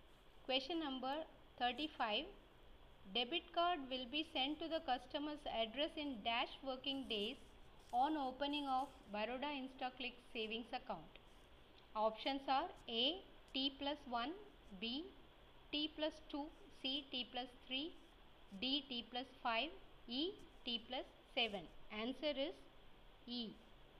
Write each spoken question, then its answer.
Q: Debit card will be sent to the customer's address in dash working days on opening of Baroda InstaClick savings account.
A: Answer is E.